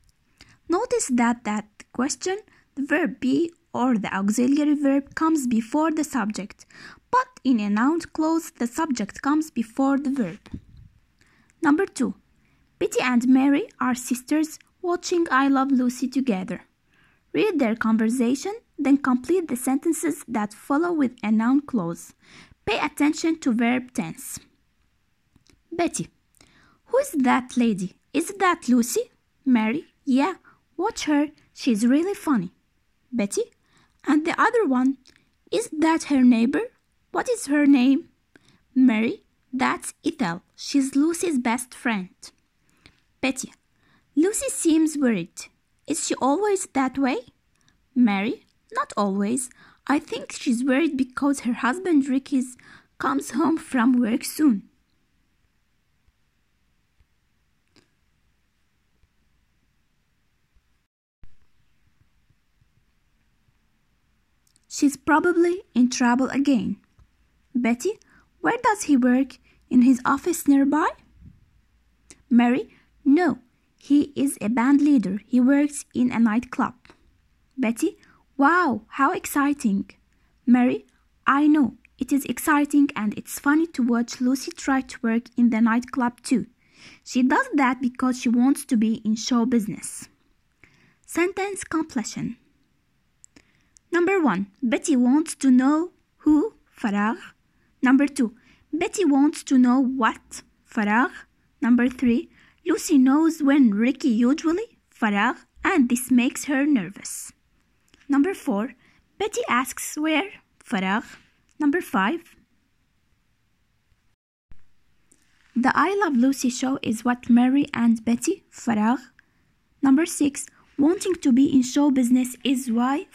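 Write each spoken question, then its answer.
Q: Betty wants to know who?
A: who that lady is

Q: Betty wants to know what?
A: what her (the neighbor's) name is

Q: Lucy knows when Ricky usually?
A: comes home from work

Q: Betty asks where?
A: where Ricky works

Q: The I Love Lucy show is what Mary and Betty?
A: are watching

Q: Wanting to be in show business is why?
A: Lucy tries to work in the nightclub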